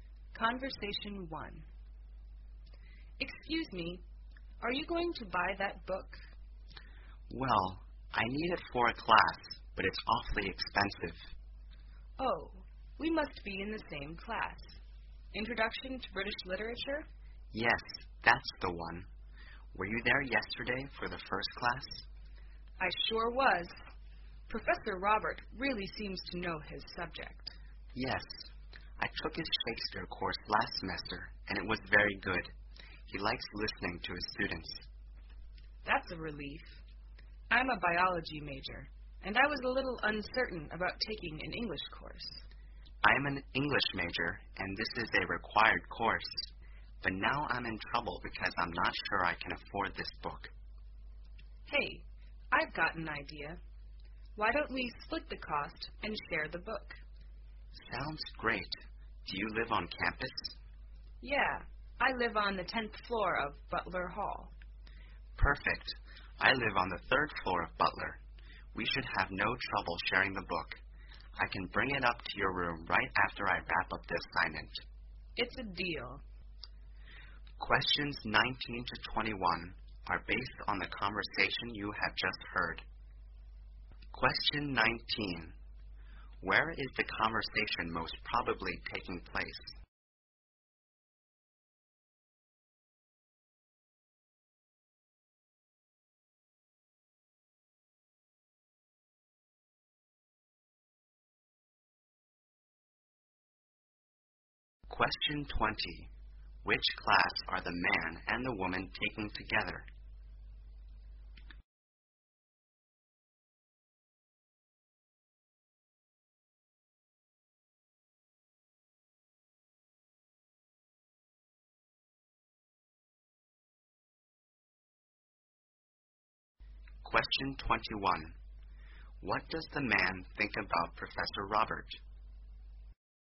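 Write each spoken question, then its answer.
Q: Where is the conversation most probably taking place?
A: In a bookstore

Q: Which class are the man and the woman taking together?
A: Introduction to British Literature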